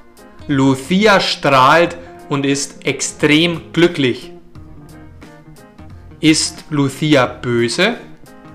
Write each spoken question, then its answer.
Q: Ist Lucia böse?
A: Nein, Lucia ist nicht böse.